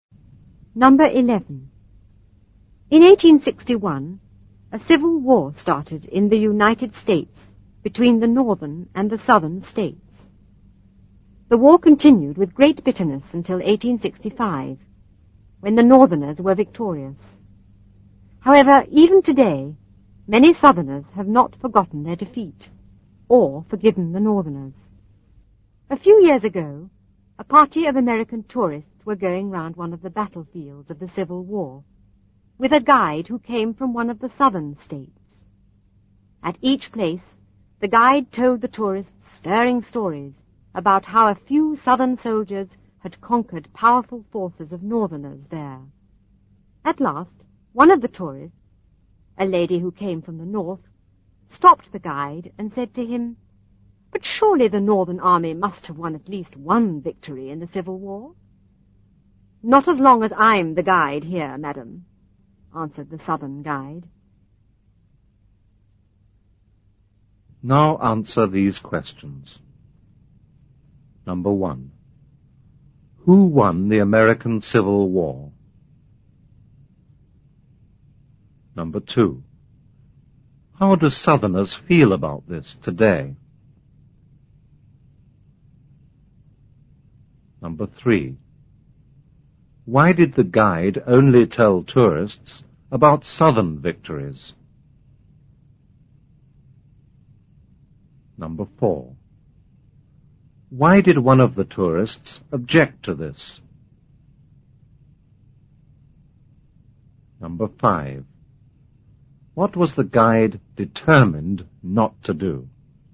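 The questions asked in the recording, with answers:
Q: Who won the American Civil War?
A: The northerners

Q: How do Southerners feel about this today?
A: Many have not forgotten their defeat or forgiven the northerners

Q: Why did the guide only tell tourists about Southern victories?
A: Because he came from the South and had not forgiven the northerners for the defeat

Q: Why did one of the tourists object to this?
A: She came from the North

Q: What was the guide determined not to do?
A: Tell tourists about any Northern victory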